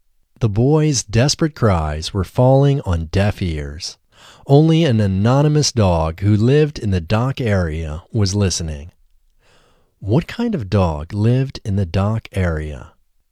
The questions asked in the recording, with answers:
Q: What kind of dog lived in the dock area?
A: An anonymous dog lived in the dock area.